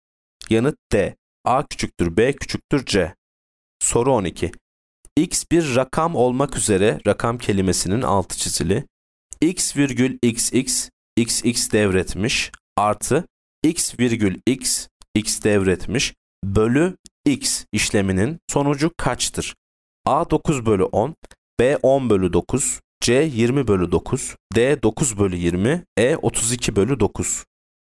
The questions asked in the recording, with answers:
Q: X virgül xx xx devretmiş artı x virgül x x devretmiş bölü x işleminin sonucu kaçtır?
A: Yanıt C 20 bölü 9.